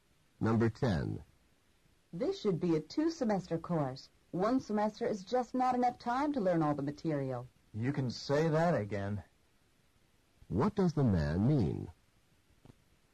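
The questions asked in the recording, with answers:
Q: What does the man mean?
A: He agrees the course needs two semesters.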